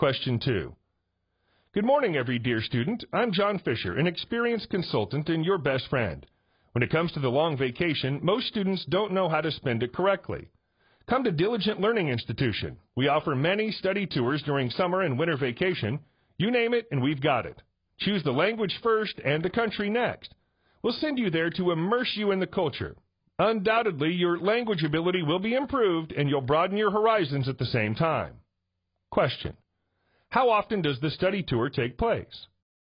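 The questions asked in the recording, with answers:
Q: How often does the study tour take place?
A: Twice a year (during summer and winter vacation)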